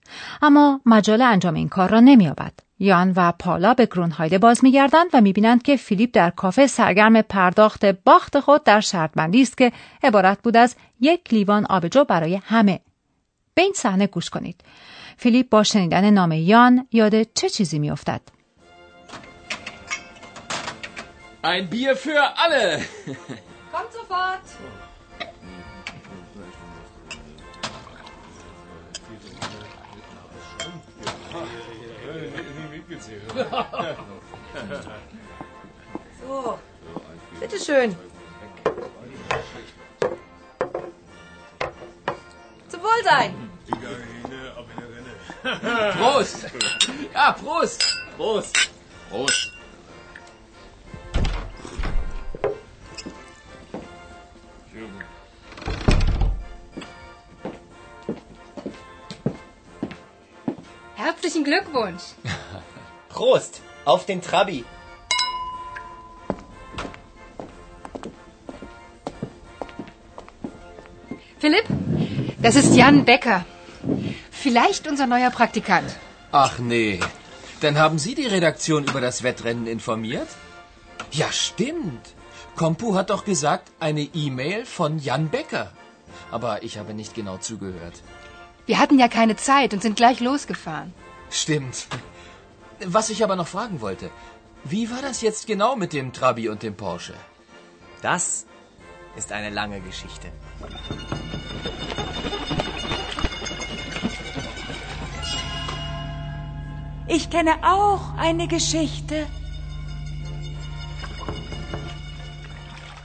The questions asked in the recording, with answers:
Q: فیلیپ با شنیدن نام یان یاد چه چیزی میافتد؟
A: فیلیپ به یاد می آورد که کمپو نام فرستنده ایمیل را اعلام کرده است ولی او دقیقا به آن گوش نداده.